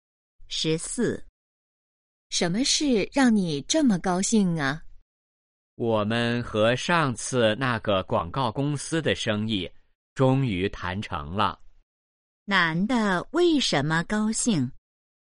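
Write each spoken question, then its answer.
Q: 男的为什么高兴?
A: 和广告公司的生意谈成了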